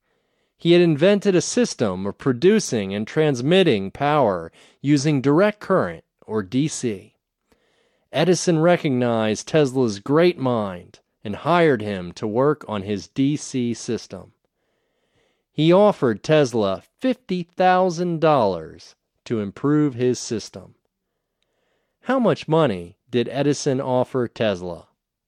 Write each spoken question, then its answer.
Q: How much money did Edison offer Tesla?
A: He offered Tesla $50,000.